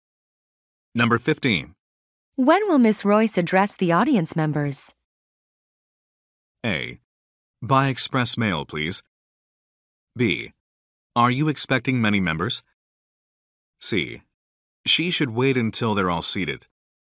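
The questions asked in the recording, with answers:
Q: When will Miss Royce address the audience members?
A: C: She should wait until they're all seated.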